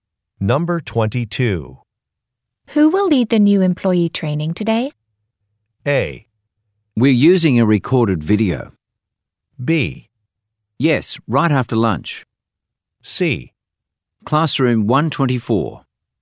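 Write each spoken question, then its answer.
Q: Who will lead the new employee training today?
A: A: We're using a recorded video.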